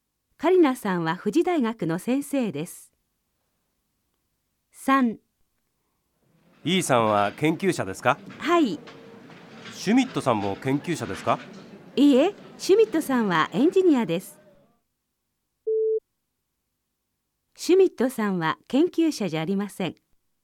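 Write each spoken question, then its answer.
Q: シュミットさんは研究者じゃありません。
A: ○ (正しい)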